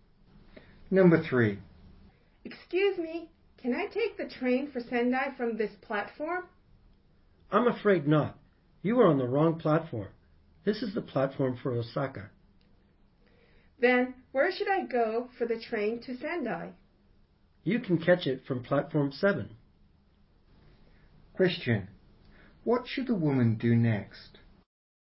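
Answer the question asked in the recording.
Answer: Go to platform 7.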